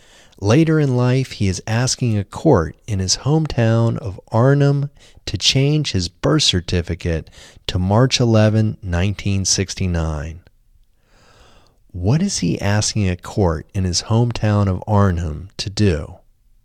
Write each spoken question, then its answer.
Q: What is he asking a court in his hometown of Arnhem to do?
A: He is asking a court in his hometown of Arnhem to change his birth certificate to March 11, 1969.